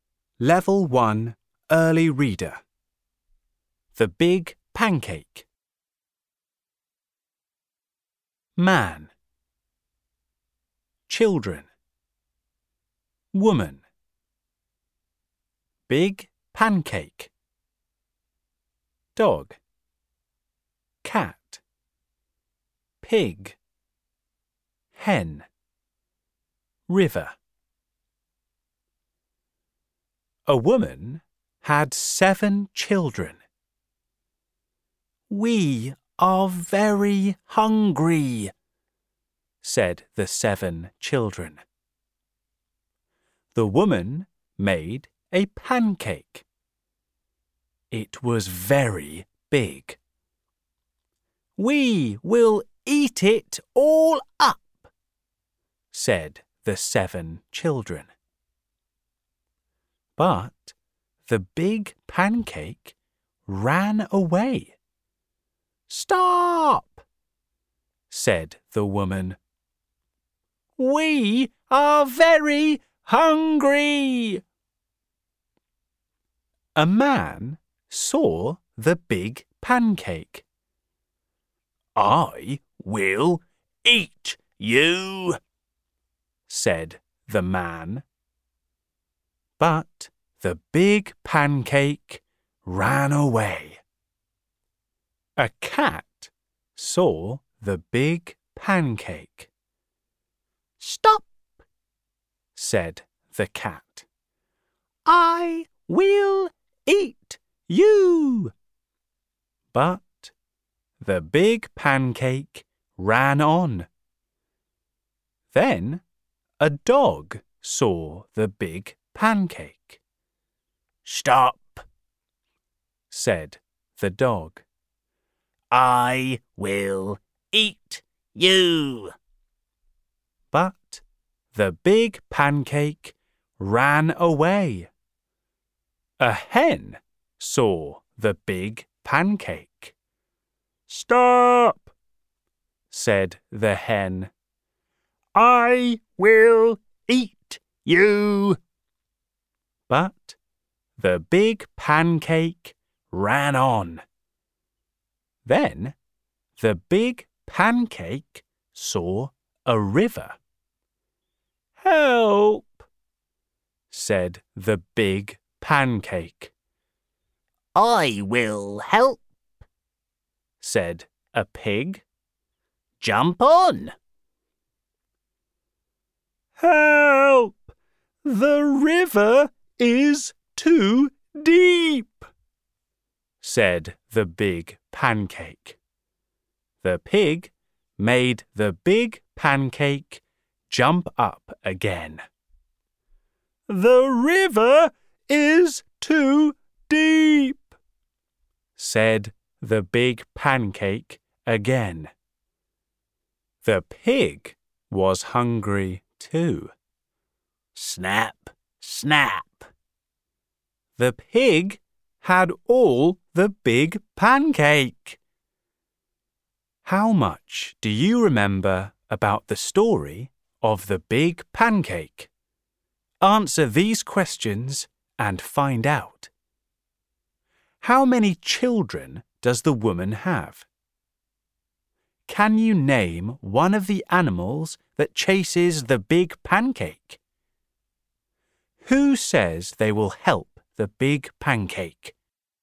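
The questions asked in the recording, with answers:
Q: Can you name one of the animals that chases the big pancake?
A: the cat, the dog or the hen

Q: Who says they will help the big pancake?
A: a pig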